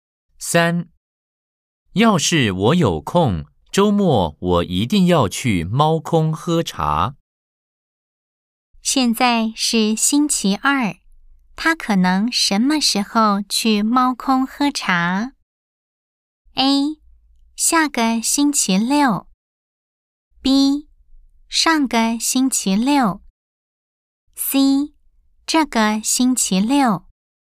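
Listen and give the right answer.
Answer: C: 这个星期六。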